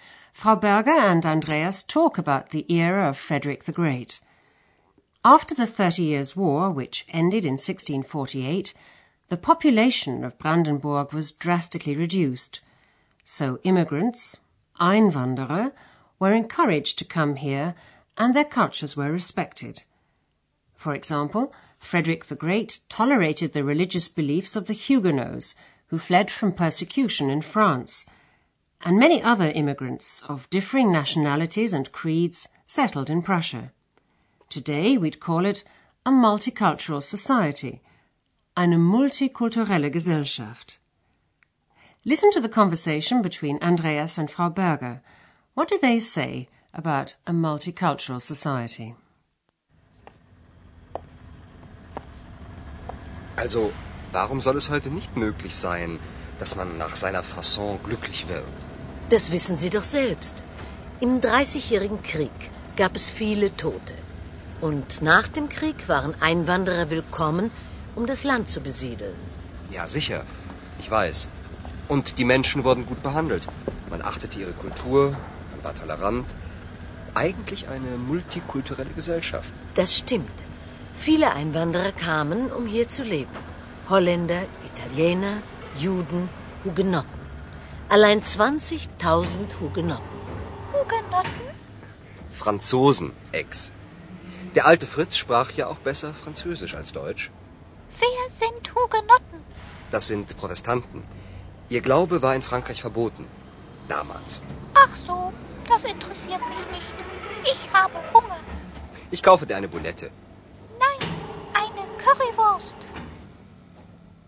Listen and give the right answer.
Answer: Andreas likes the idea of a multicultural society, which was more of a reality in Frederick the Great's day than it is today.